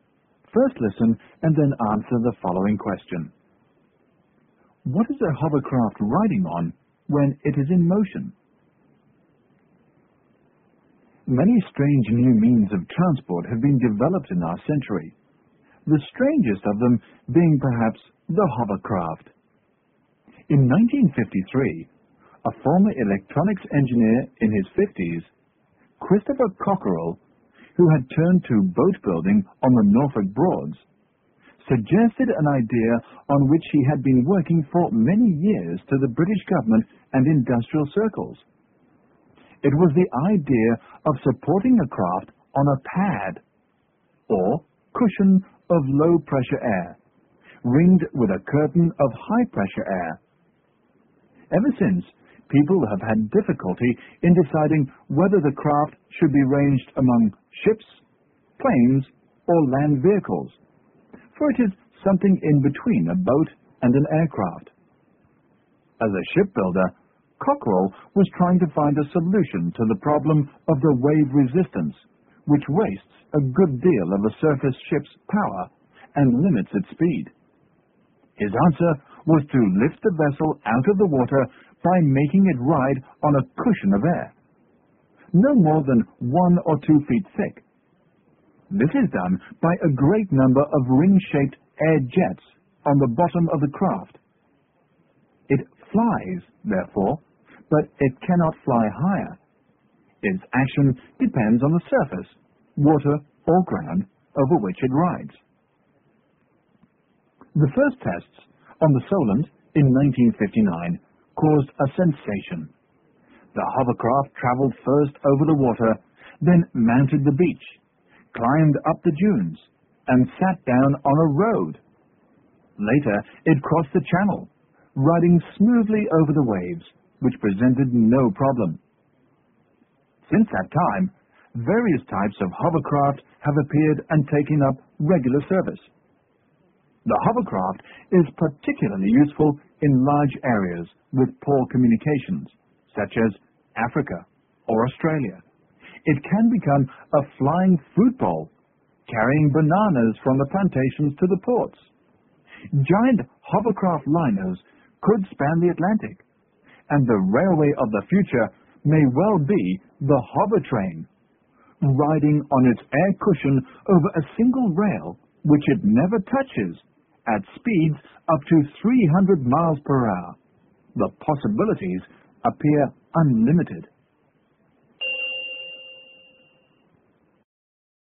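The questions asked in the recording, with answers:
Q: What is a hovercraft riding on when it is in motion?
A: A cushion of air, no more than 1 or 2 feet thick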